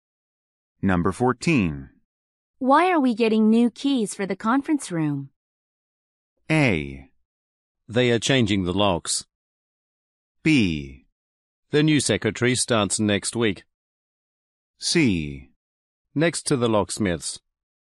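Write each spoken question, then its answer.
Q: Why are we getting new keys for the conference room?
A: A: They are changing the locks.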